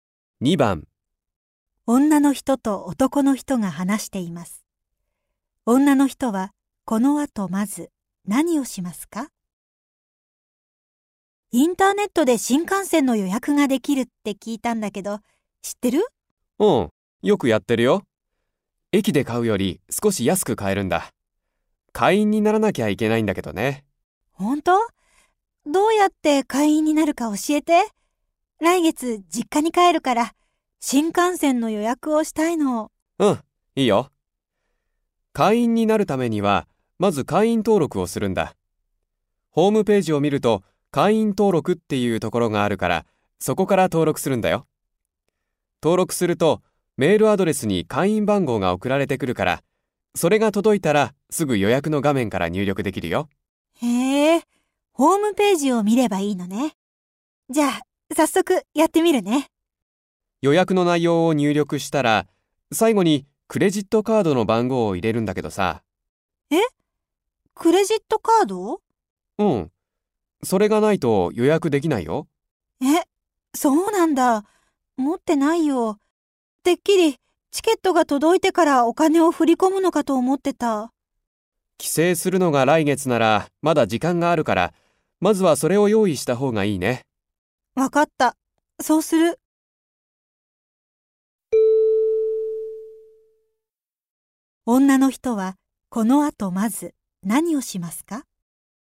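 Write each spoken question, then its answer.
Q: 女の人はこの後まず何をしますか?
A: クレジットカードを用意する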